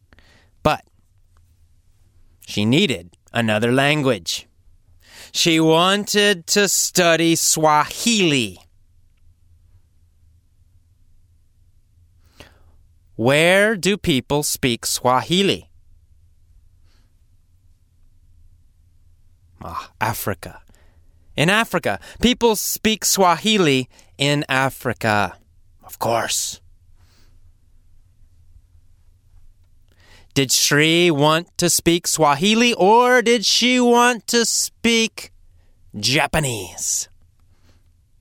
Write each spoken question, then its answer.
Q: Did Shri want to speak Swahili or did she want to speak Japanese?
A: She wanted to speak Swahili.